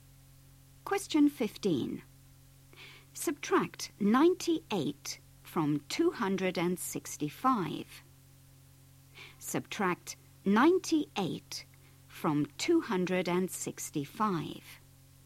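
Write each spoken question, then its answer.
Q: Subtract 98 from 265.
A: 167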